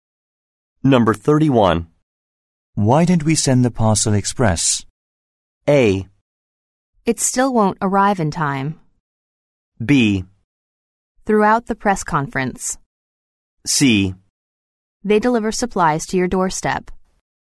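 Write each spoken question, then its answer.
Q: Why didn't we send the parcel express?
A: A: It still won't arrive in time.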